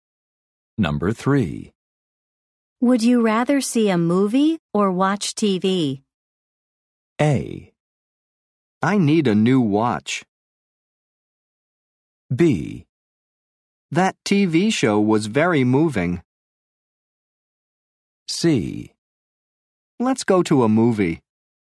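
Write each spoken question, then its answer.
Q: Would you rather see a movie or watch TV?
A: C: Let's go to a movie.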